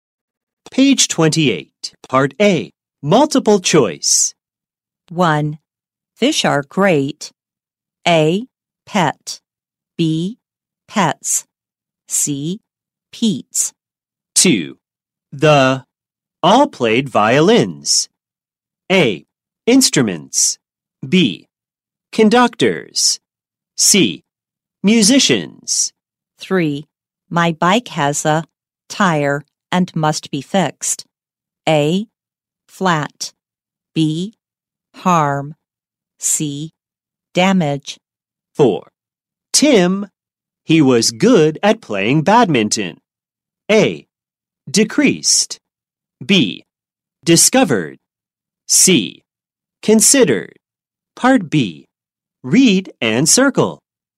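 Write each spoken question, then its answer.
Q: Fish are great. A. Pet. B. Pets. C. Pete's.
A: B: Pets

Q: The all played violins. A. Instruments. B. Conductors. C. Musicians.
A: C: Musicians

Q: My bike has a tire and must be fixed. A. Flat. B. Harm. C. Damage.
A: A: Flat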